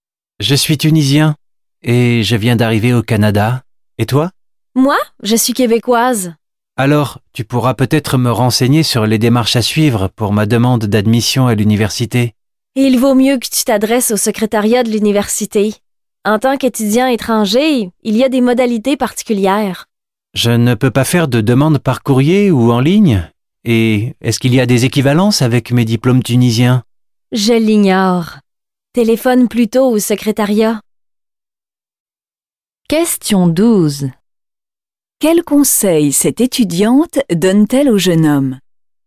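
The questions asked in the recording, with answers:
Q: Quel conseil cette étudiante donne-t-elle au jeune homme?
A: De s'adresser (téléphoner) au secrétariat de l'université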